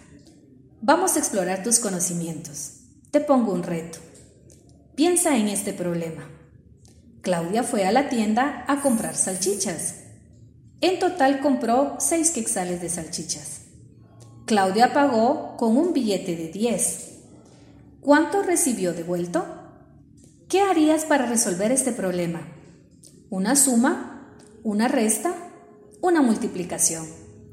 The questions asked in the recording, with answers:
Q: ¿Cuánto recibió devuelto?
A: Si tu respuesta es 4, estás en lo correcto.